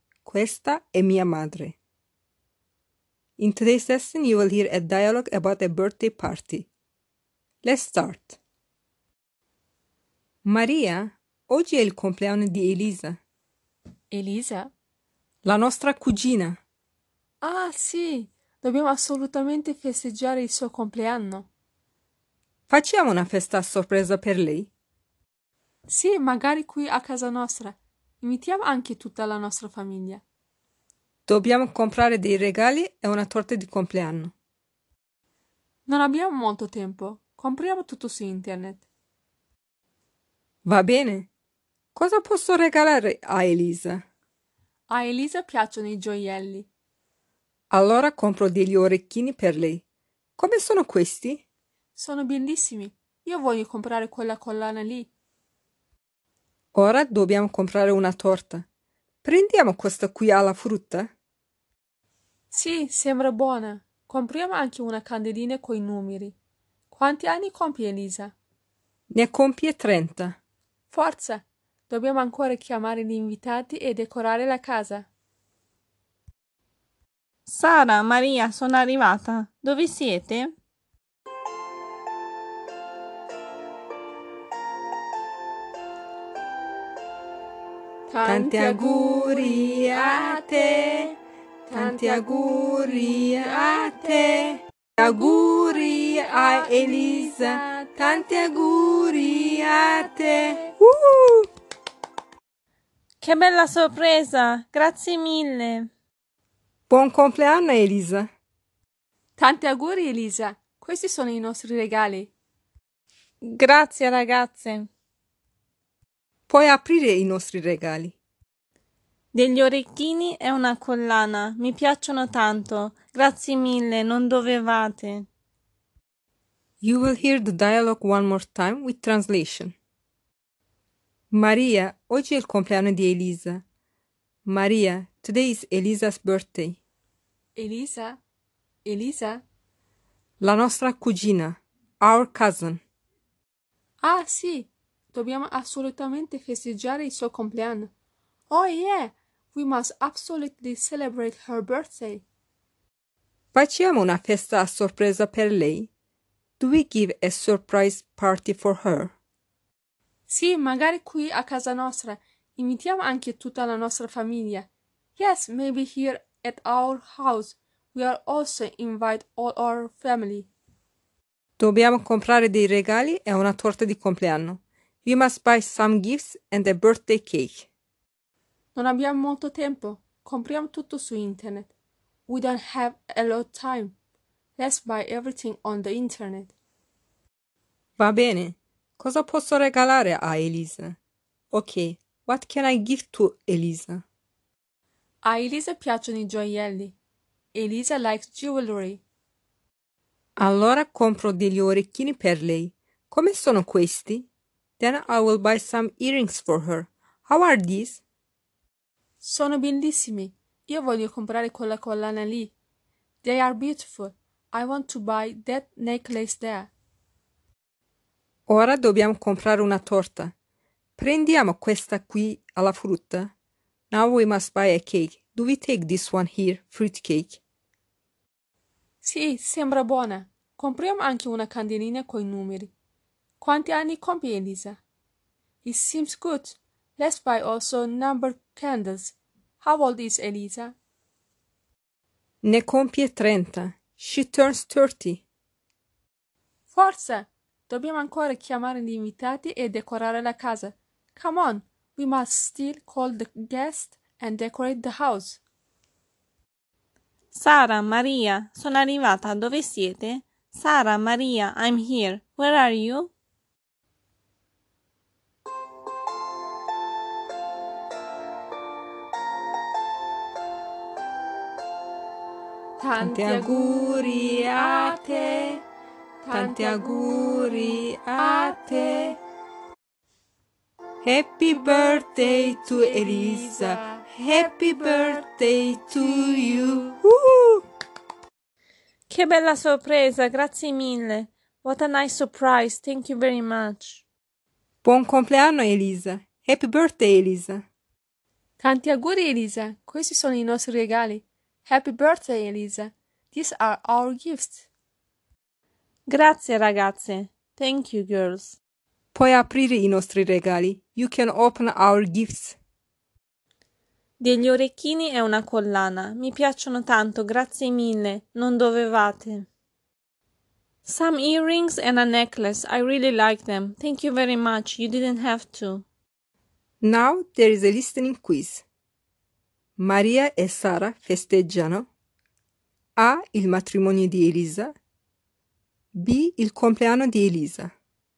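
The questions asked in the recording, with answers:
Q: Maria e Sara festeggiano.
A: B: Il compleanno di Elisa.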